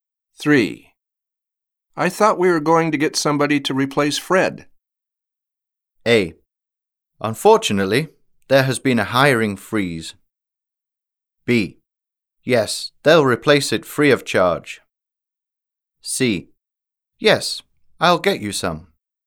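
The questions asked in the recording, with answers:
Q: I thought we were going to get somebody to replace Fred.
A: A: Unfortunately, there has been a hiring freeze.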